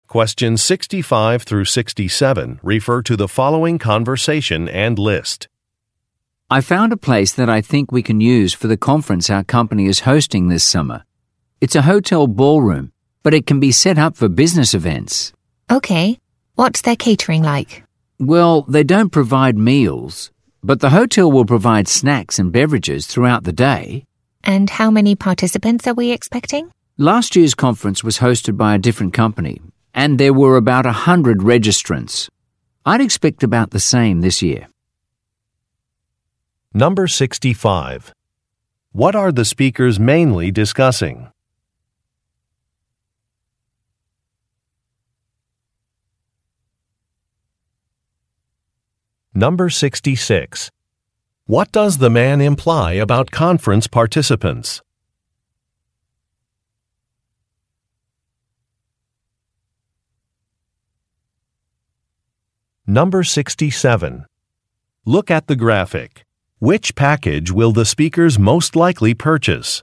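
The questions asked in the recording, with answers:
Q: What are the speakers mainly discussing?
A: A venue for their company's summer conference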